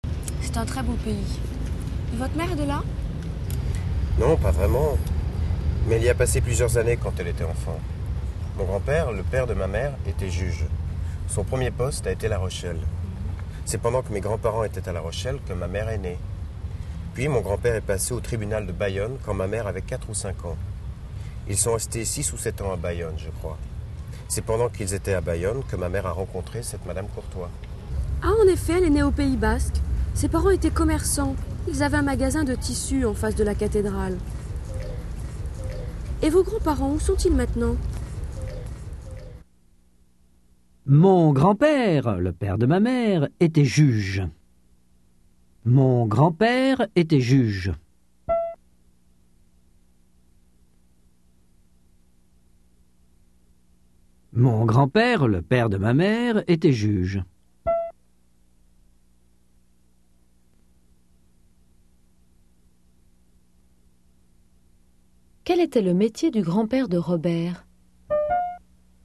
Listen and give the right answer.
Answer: Il était juge.